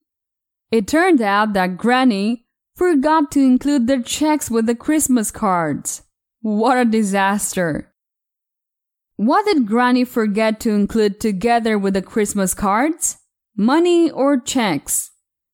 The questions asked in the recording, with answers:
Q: What did Granny forget to include together with the Christmas cards?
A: Checks, not money. Granny forgot to include the checks.